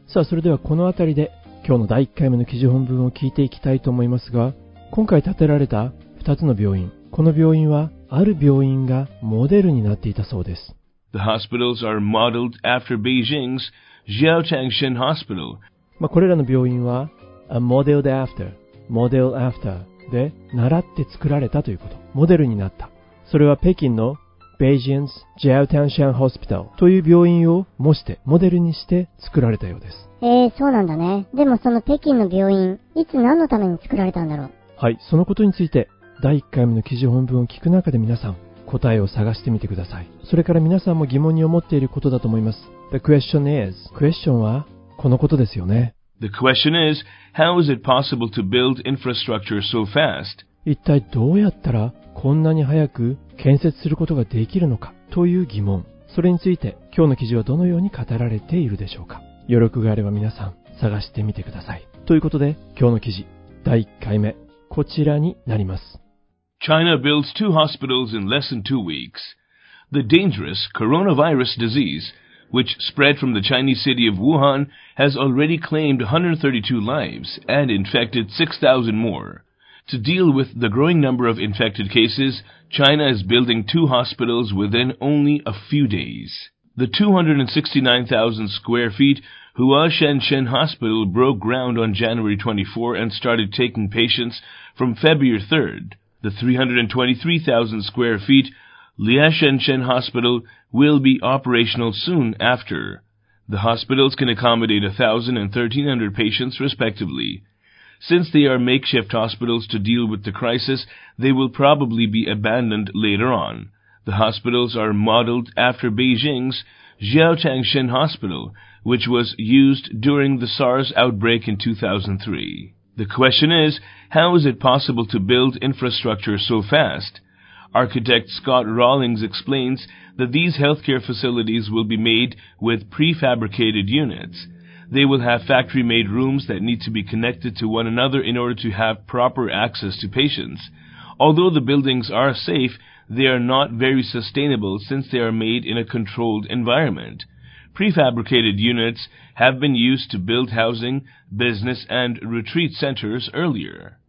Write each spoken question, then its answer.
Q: でもその北京の病院、いつ何のために作られたんだろう。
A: 2003年の SARS の outbreak 発生の時に使われていた病院だったようです。

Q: The question is, how is it possible to build infrastructure so fast?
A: 今回のヘルスケア施設はプレハブ方式で建設されていると建築家のスコット・ローリングスさんは説明します。